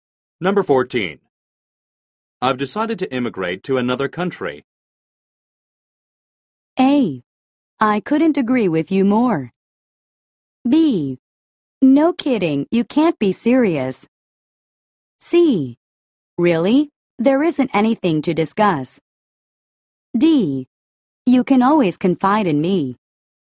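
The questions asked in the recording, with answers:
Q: I've decided to immigrate to another country.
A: B: No kidding, you can't be serious.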